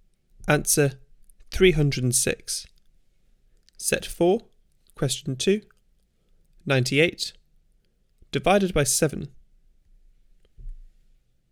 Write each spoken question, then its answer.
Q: 98, divided by 7.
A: Answer 14.